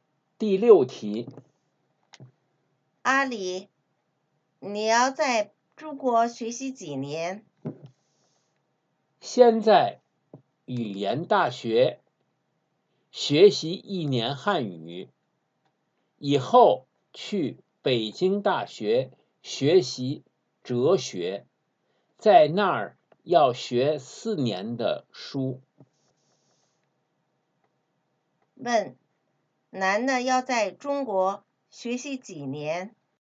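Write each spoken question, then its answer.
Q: 问,男的要在中国学习几年?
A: 五年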